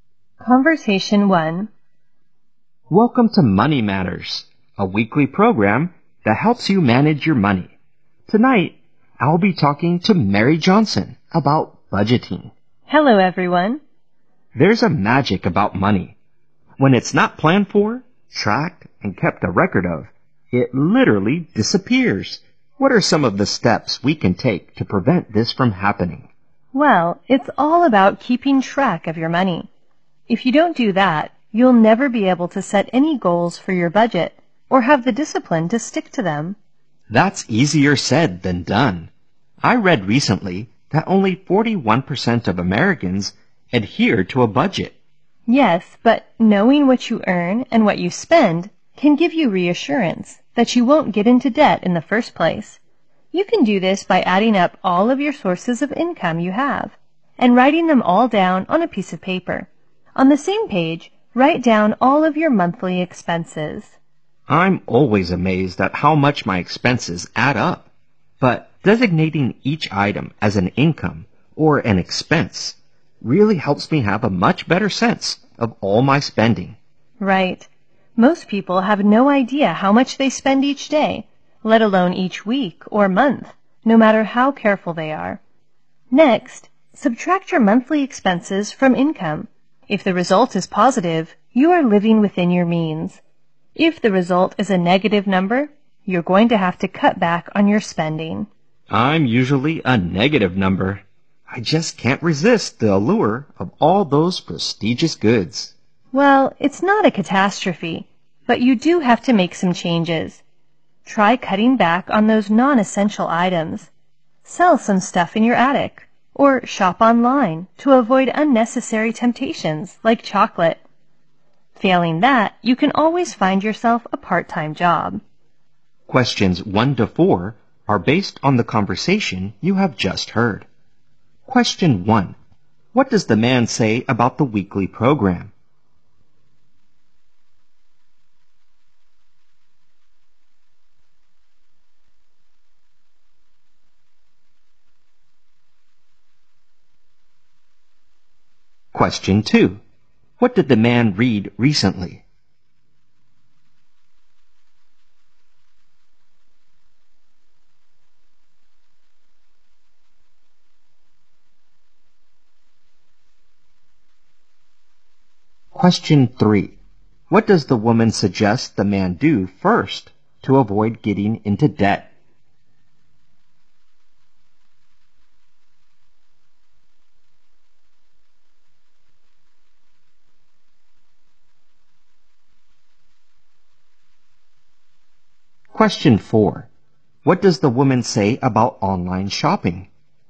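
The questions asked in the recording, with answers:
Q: What does the man say about the weekly program?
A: It helps you manage your money.

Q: What did the man read recently?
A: Only 41% of Americans stick to a budget.

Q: What does the woman suggest the man do first to avoid getting into debt?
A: Write down all his sources of income and his monthly expenses.

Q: What does the woman say about online shopping?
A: It helps avoid unnecessary temptations.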